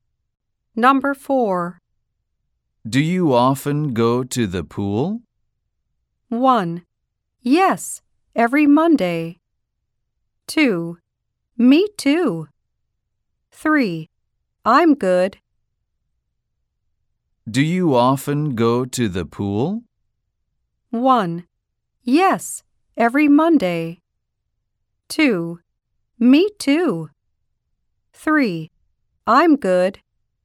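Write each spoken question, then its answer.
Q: Do you often go to the pool?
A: 1: Yes, every Monday.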